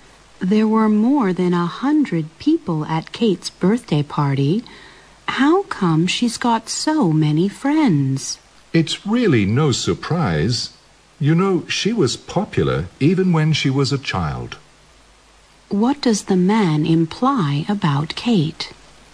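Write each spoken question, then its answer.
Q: What does the man imply about Kate?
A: Kate has always been popular, even as a child, so having many friends is no surprise.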